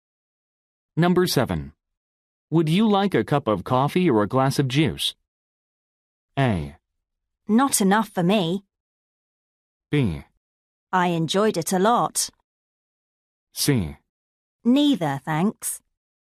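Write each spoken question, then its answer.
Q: Would you like a cup of coffee or a glass of juice?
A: C: Neither, thanks.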